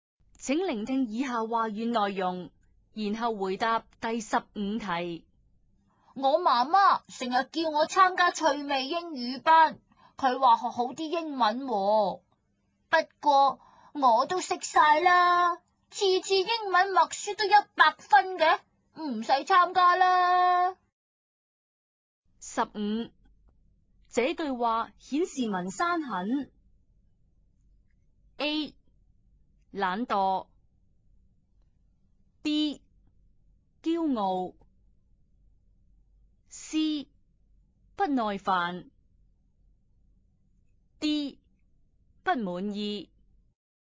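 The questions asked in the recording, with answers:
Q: 这句话显示文山很 A 懒惰, B 骄傲, C 不耐烦, D 不满意。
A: B: 骄傲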